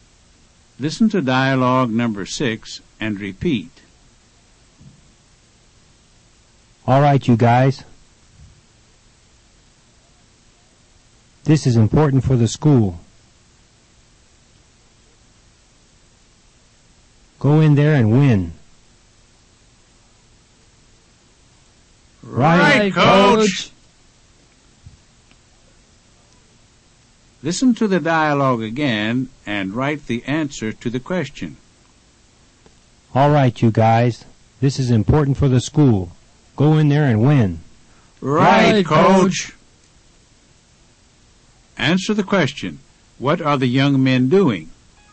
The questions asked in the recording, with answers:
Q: What are the young men doing?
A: They're playing in a game.